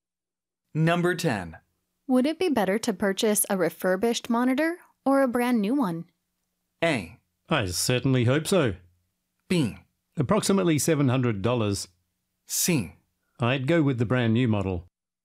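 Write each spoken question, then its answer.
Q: Would it be better to purchase a refurbished monitor or a brand new one?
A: C: I'd go with the brand new model.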